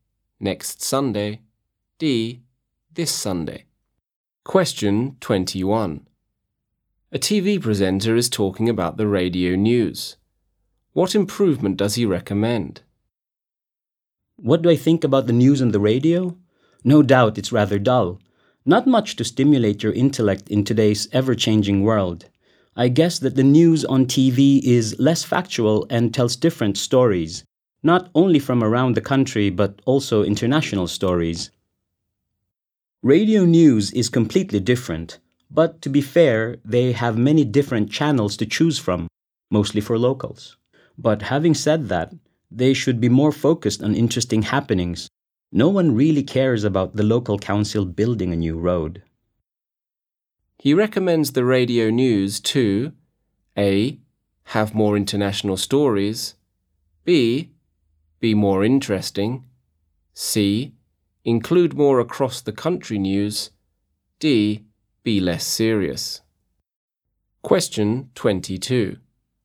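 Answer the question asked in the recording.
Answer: B: be more interesting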